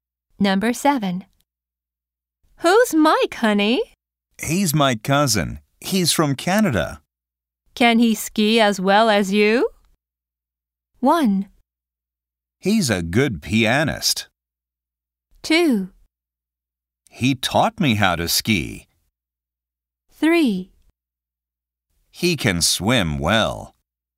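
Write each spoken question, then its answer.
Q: Can he ski as well as you?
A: 2: He taught me how to ski.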